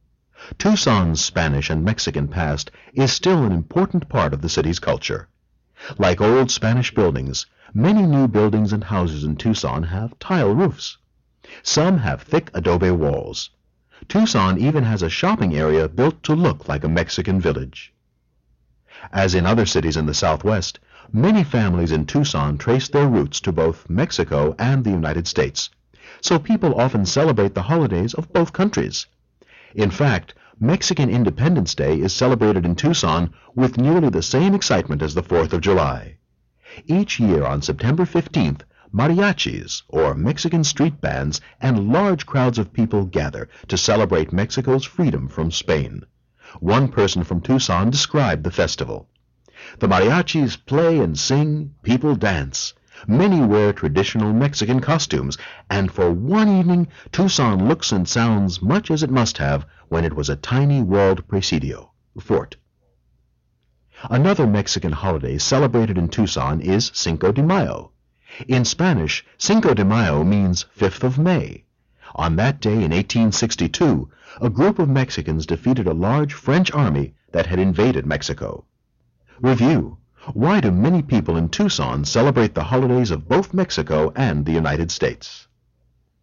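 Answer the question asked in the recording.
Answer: Because many families trace their roots to both Mexico and the United States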